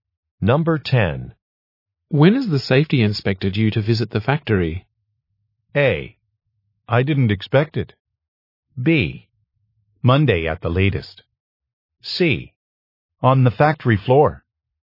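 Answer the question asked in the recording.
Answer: B: Monday at the latest.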